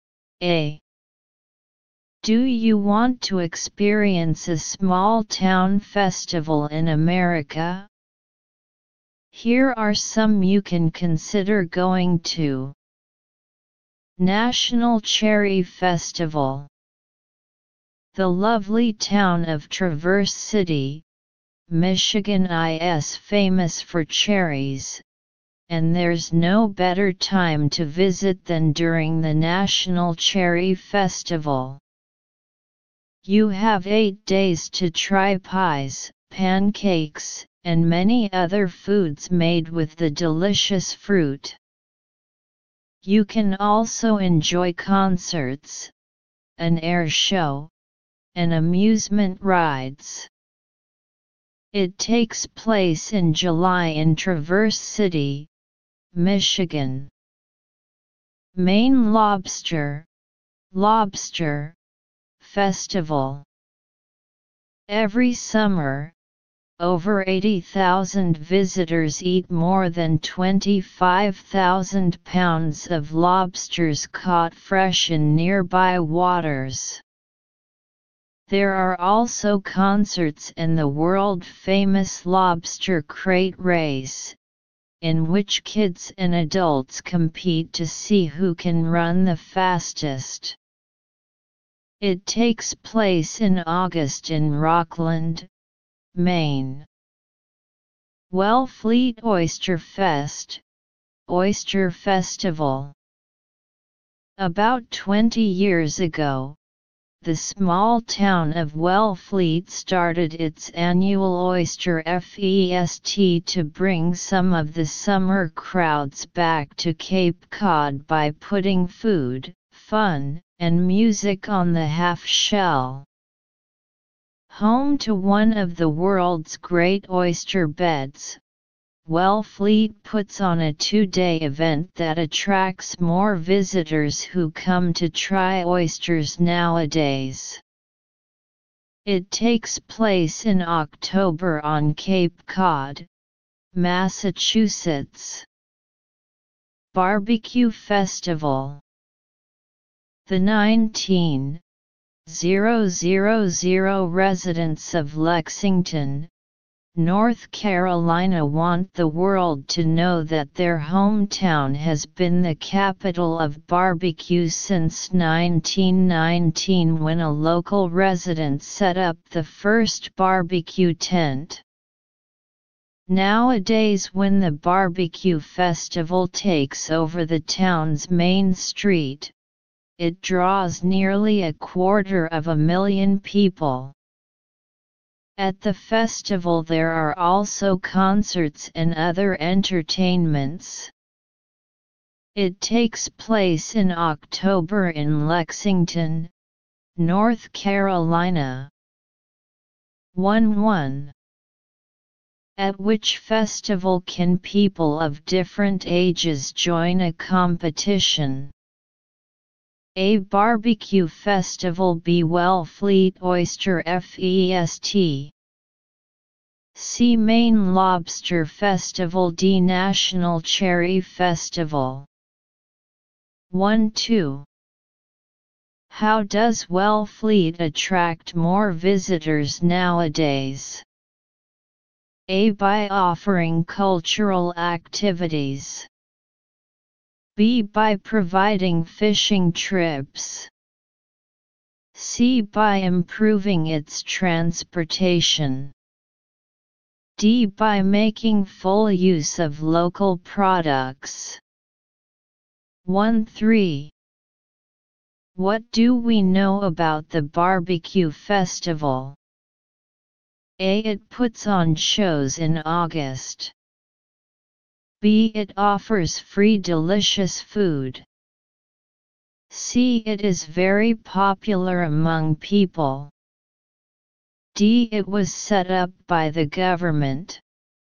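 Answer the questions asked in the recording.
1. C: Maine Lobster Festival.
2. D: By making full use of local products.
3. C: It is very popular among people.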